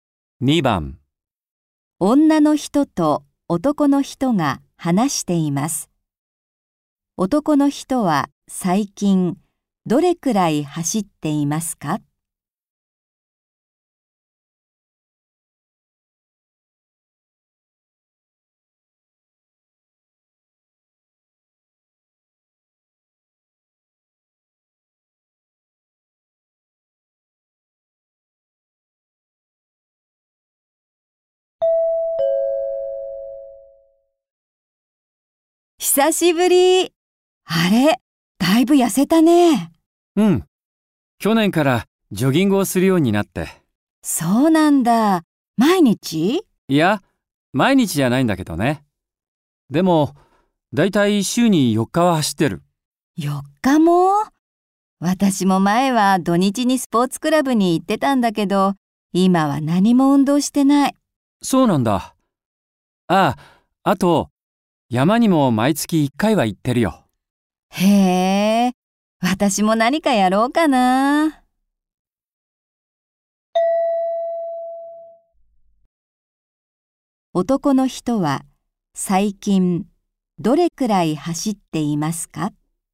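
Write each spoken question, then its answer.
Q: 男の人は最近どれくらい走っていますか?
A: 週に4日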